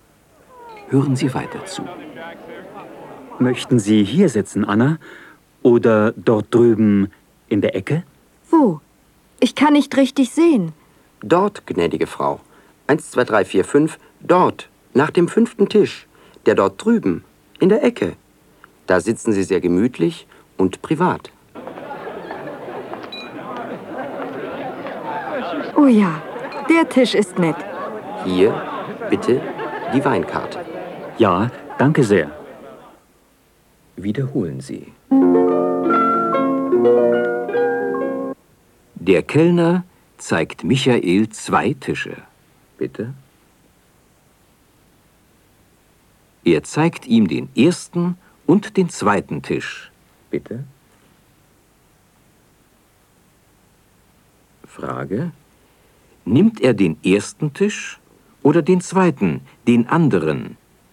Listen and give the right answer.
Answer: Er nimmt den anderen Tisch.